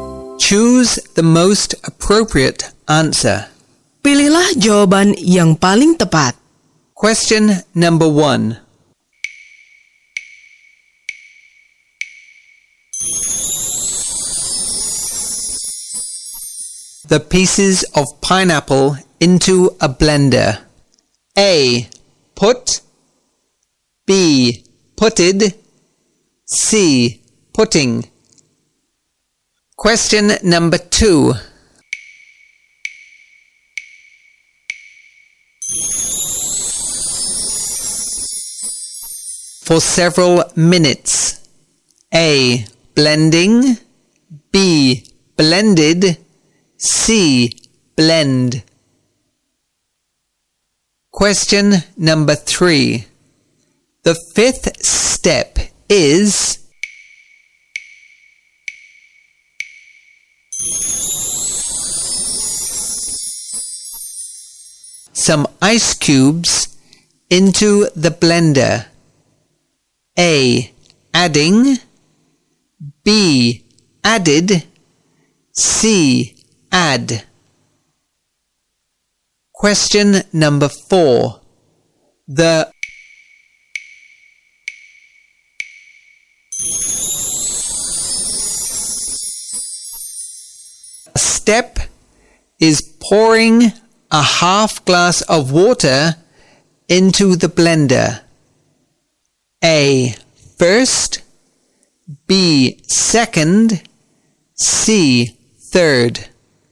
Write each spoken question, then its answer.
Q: For several minutes.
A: C. Blend.

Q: The fifth step is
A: A. Adding.

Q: step is pouring a half glass of water into the blender.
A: C. Third.